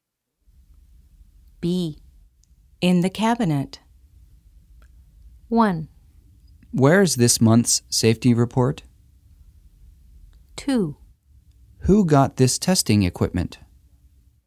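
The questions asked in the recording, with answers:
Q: In the cabinet.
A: 1: Where is this month's safety report?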